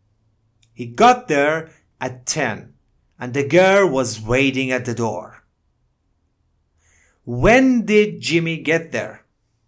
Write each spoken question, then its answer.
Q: When did Jimmy get there?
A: At 10 o'clock. He got there at 10 o'clock.